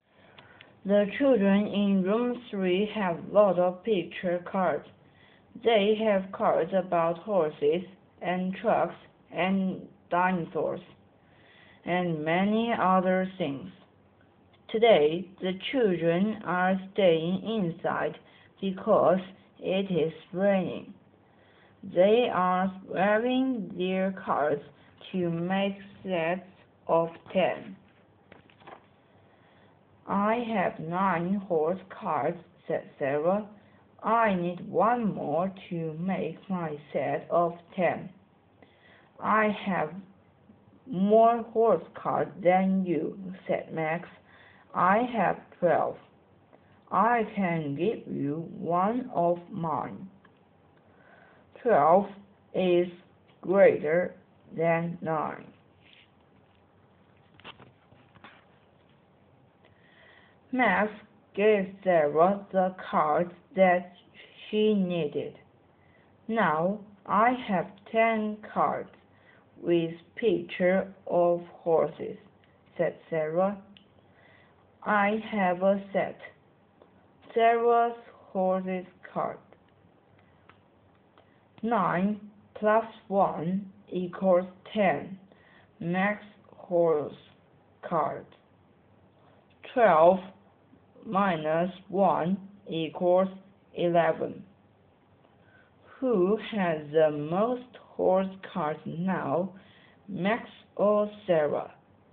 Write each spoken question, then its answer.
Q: Who has the most horse cards now, Max or Sarah?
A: Max still have more horse cards than Sarah because 11 is greater than 10.